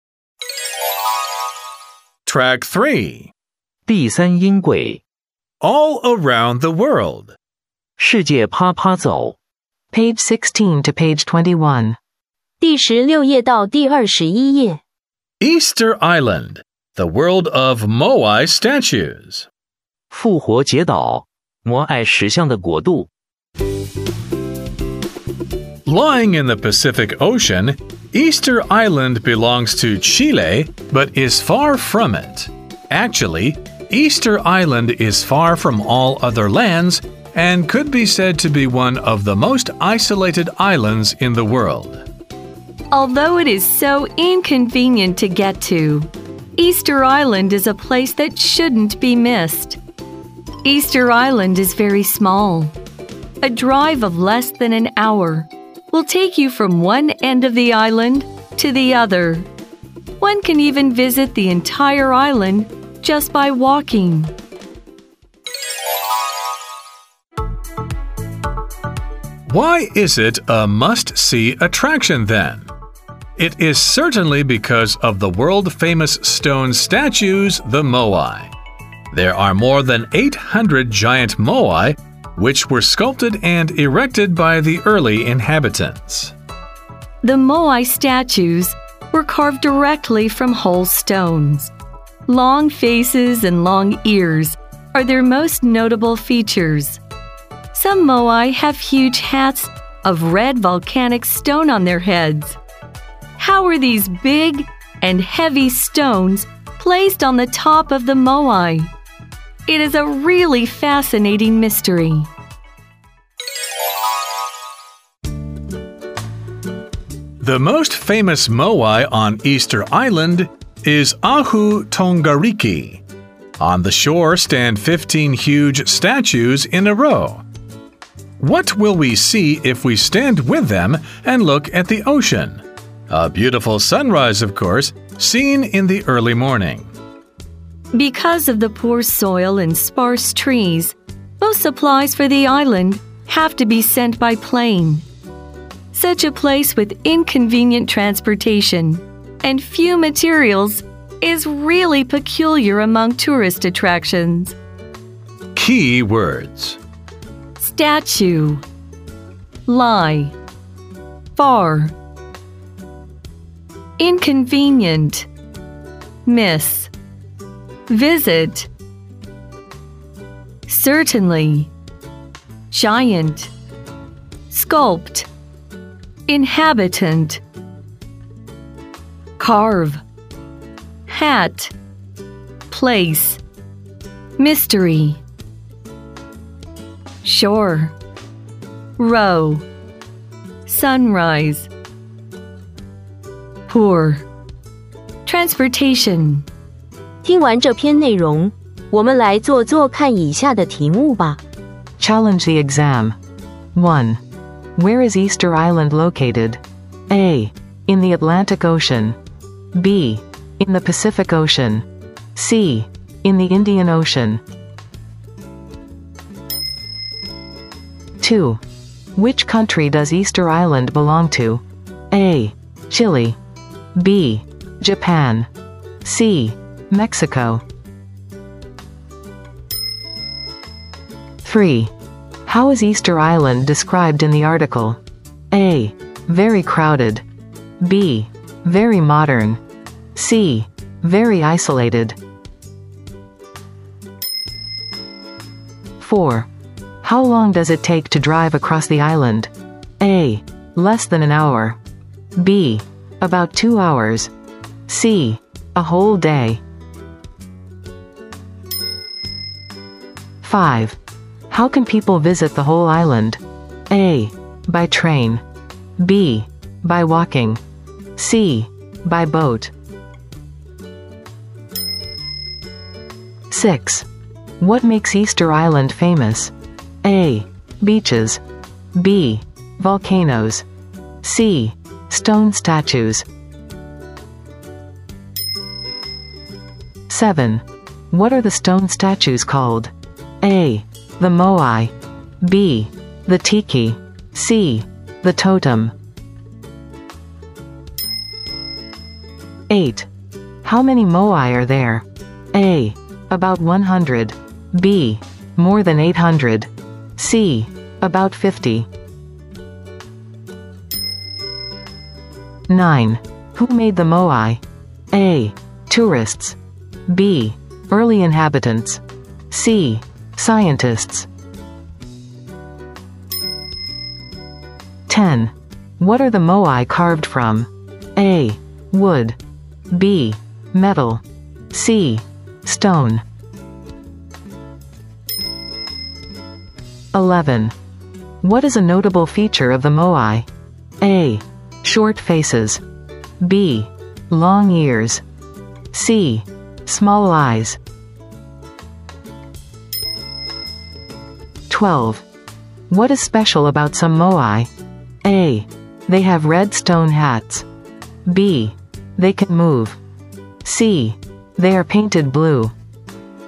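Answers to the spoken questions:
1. B: In the Pacific Ocean.
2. A: Chile.
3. C: Very isolated.
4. A: Less than an hour.
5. B: By walking.
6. C: Stone statues.
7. A: The Moai.
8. B: More than 800.
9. B: Early inhabitants.
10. C: Stone.
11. B: Long ears.
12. A: They have red stone hats.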